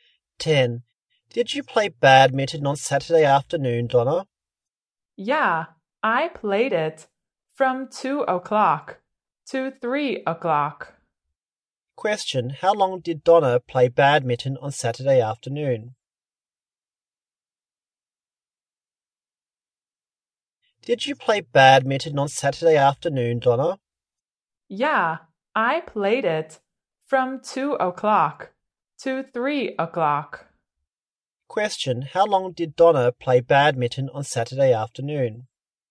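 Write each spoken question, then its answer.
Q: how long did Donna play badminton on Saturday afternoon?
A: For one hour.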